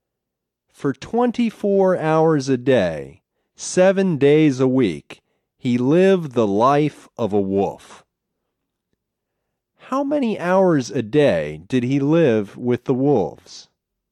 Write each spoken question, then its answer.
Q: How many hours a day did he live with the wolves?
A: He lived with them 24 hours a day.